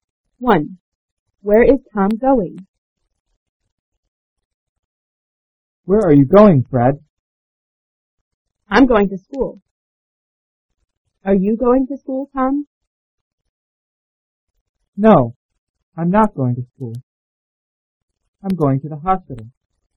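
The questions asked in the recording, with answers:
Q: Where is Tom going?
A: To the hospital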